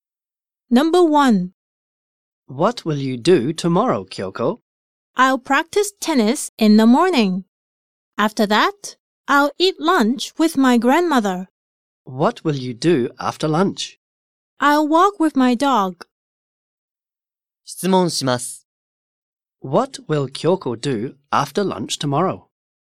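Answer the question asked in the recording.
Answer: She will walk with her dog.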